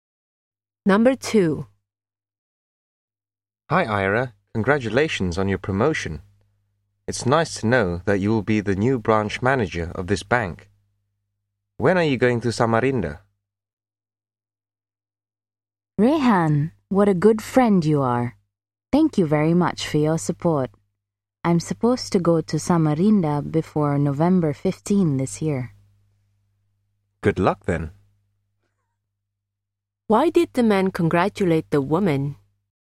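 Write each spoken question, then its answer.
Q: Why did the man congratulate the woman?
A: Because she was promoted to be the new branch manager of the bank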